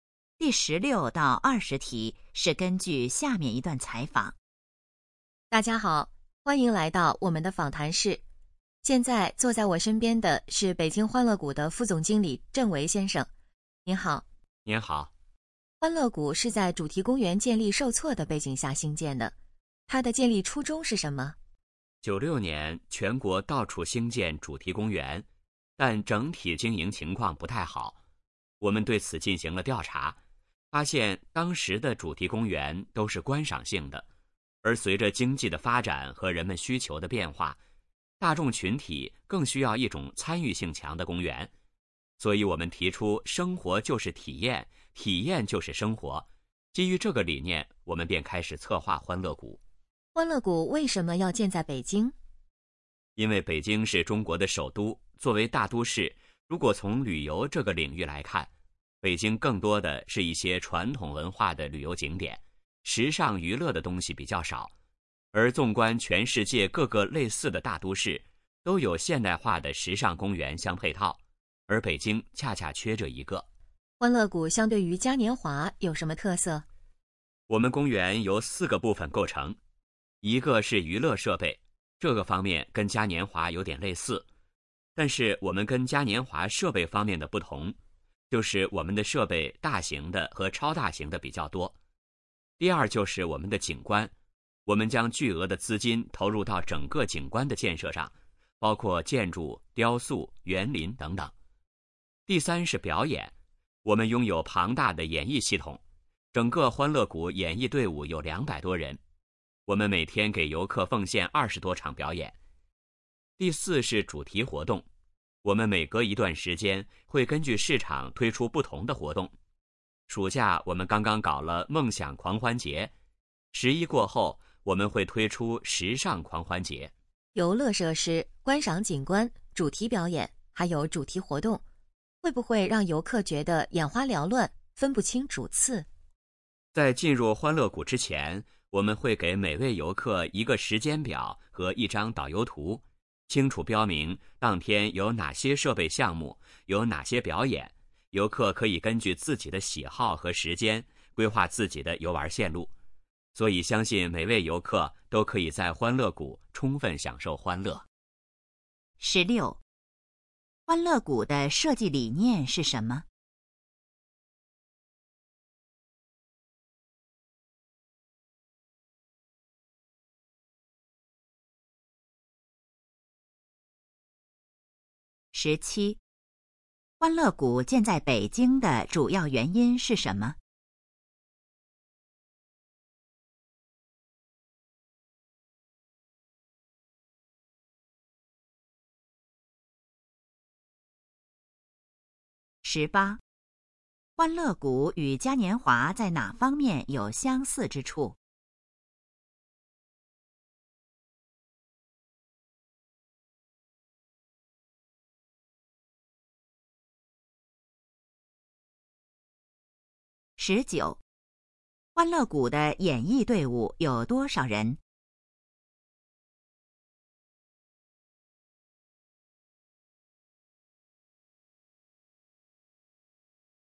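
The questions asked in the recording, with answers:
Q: 欢乐谷的设计理念是什么?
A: 生活就是体验,体验就是生活

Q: 欢乐谷建在北京的主要原因是什么?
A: 北京缺少现代化的时尚娱乐公园

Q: 欢乐谷与嘉年华在哪方面有相似之处?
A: 娱乐设备

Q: 欢乐谷的演艺队伍有多少人?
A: 200多人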